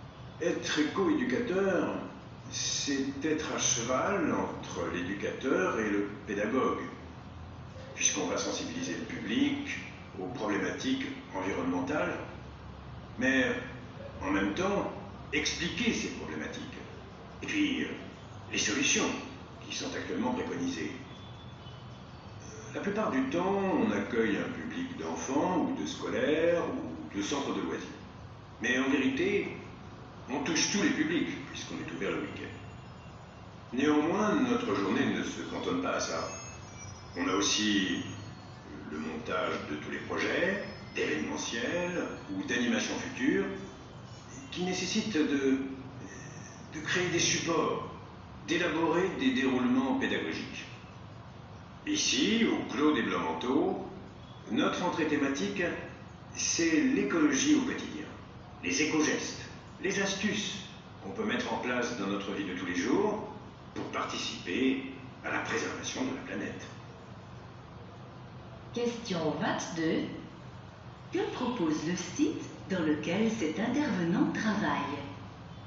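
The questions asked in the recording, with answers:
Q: Que propose le site dans lequel cet intervenant travaille ?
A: Une sensibilisation à l'écologie au quotidien : les éco-gestes et astuces pour préserver la planète dans la vie de tous les jours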